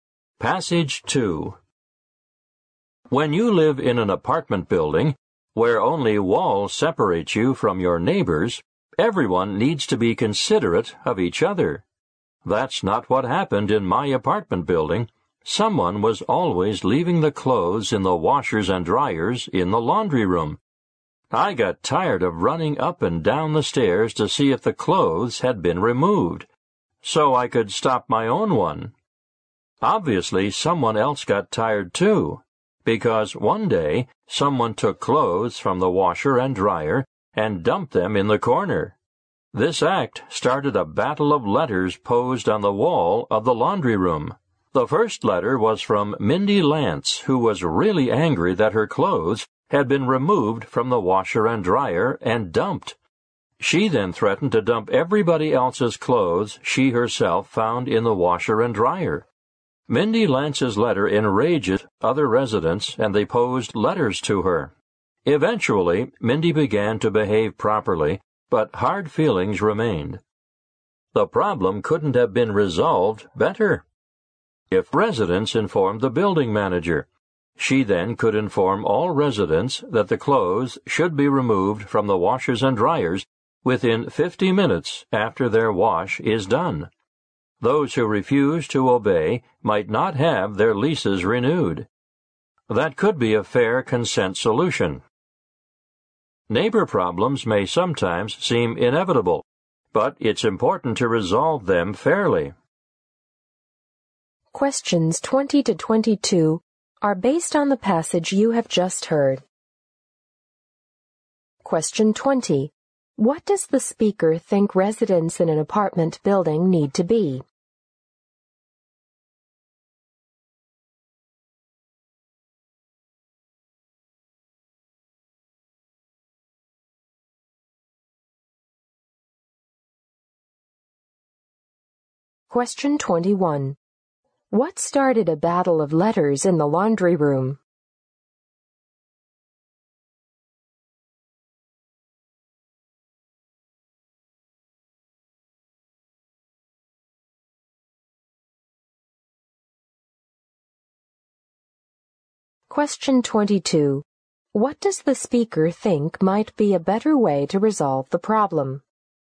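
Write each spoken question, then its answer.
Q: What does the speaker think residents in an apartment building need to be?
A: Considerate of each other

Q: What started a battle of letters in the laundry room?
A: Someone took clothes from the washer and dryer and dumped them in the corner

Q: What does the speaker think might be a better way to resolve the problem?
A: Tell the building manager, who could tell all residents to remove clothes within 50 minutes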